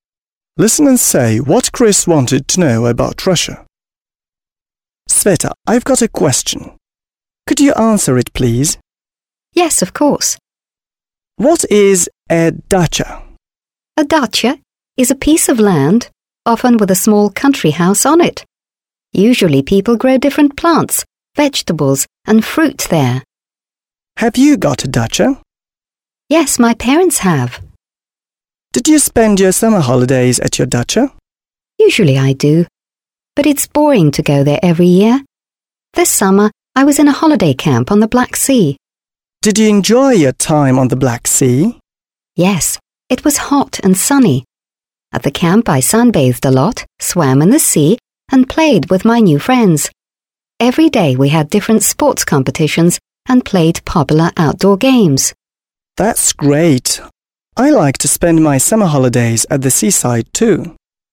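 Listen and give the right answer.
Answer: What a dacha is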